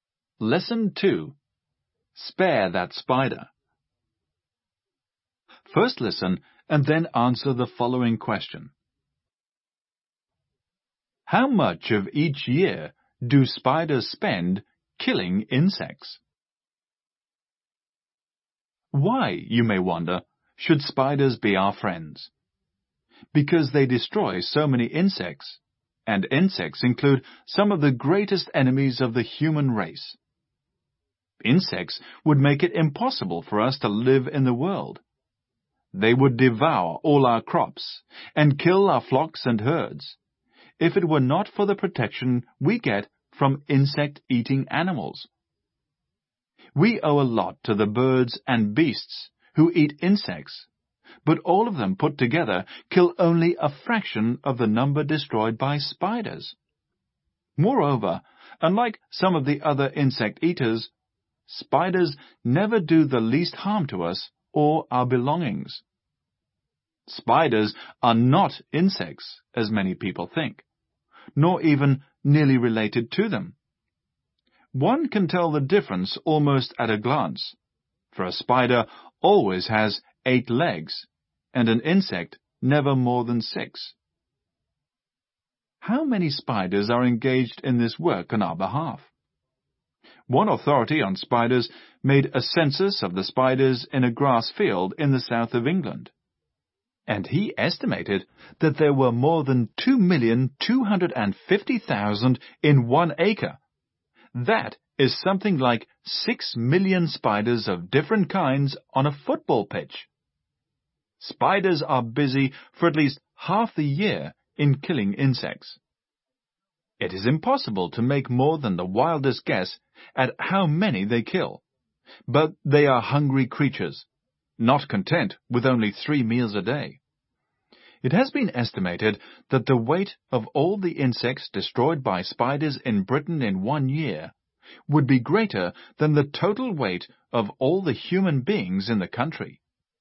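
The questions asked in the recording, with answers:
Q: How much of each year do spiders spend killing insects?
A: At least half the year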